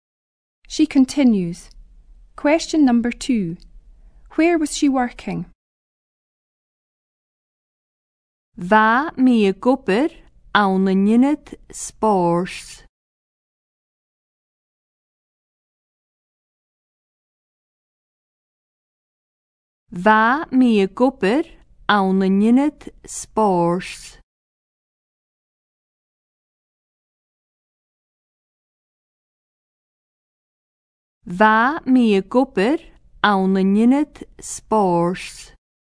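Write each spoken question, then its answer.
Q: Where was she working?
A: In a sports centre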